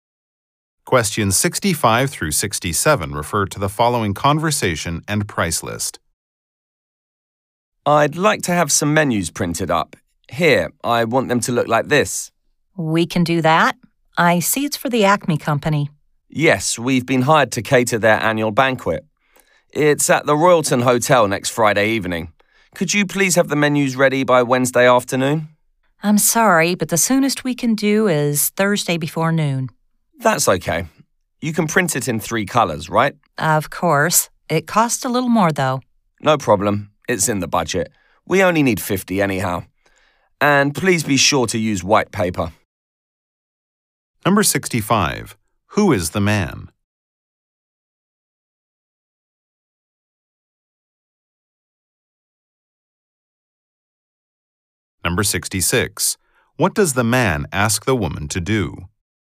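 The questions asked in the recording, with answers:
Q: Who is the man?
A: A caterer

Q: What does the man ask the woman to do?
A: Print menus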